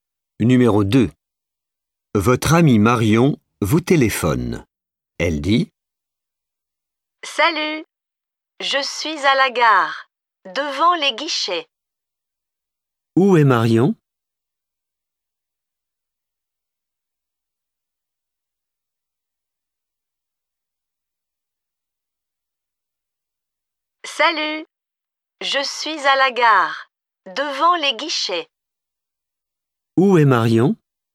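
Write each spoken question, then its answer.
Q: Où est Marion ?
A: À la gare, devant les guichets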